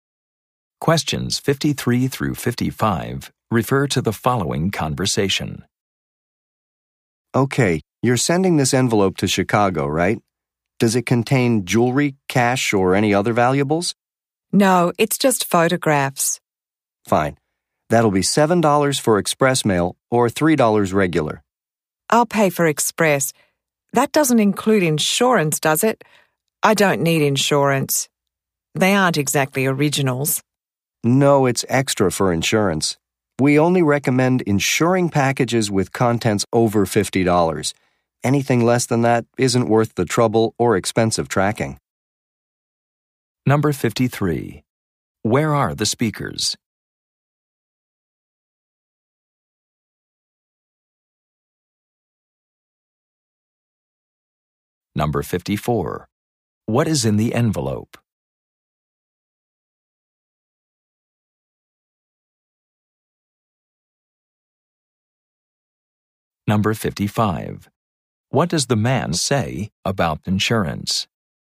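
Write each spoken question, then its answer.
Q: Where are the speakers?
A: At a post office.

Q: What is in the envelope?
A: Photographs.

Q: What does the man say about insurance?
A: It costs extra.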